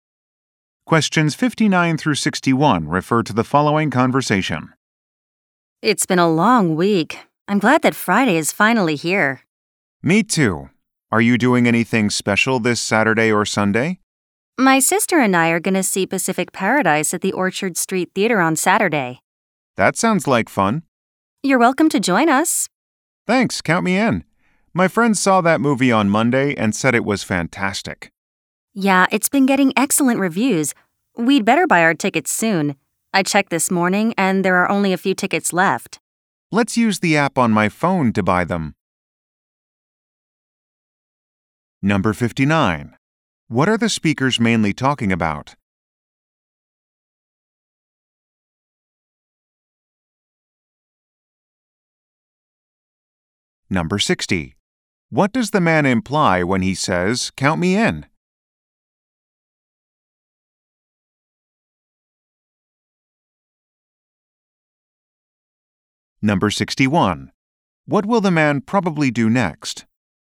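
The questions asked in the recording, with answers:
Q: What are the speakers mainly talking about?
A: Weekend plans to see a movie

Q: What does the man imply when he says, "Count me in"?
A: He wants to join them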